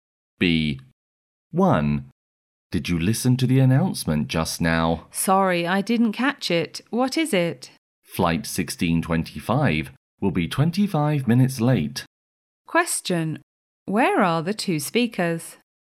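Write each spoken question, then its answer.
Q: Where are the two speakers?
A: At the airport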